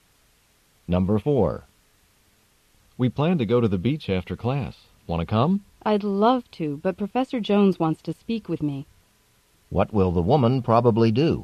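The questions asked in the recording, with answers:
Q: What will the woman probably do?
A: Meet with Professor Jones instead of going to the beach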